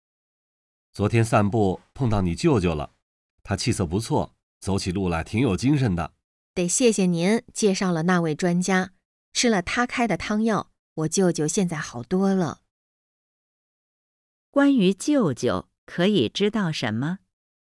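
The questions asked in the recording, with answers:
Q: 关于舅舅,可以知道什么?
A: 吃了专家开的汤药,现在好多了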